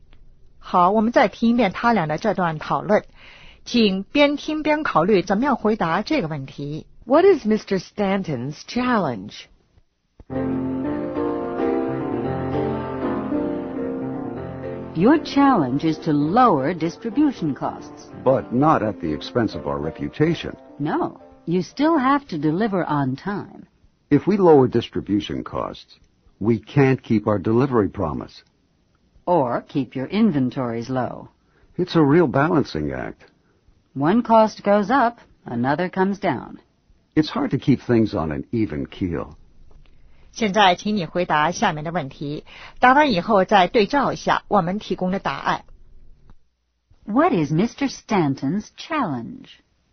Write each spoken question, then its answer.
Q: What is Mr. Stanton's challenge?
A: To lower distribution costs.